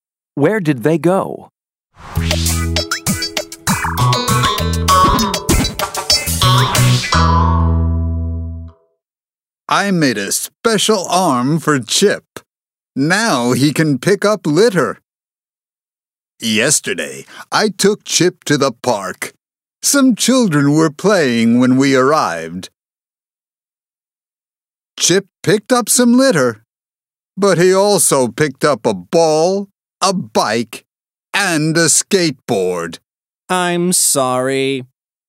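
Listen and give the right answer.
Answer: To the park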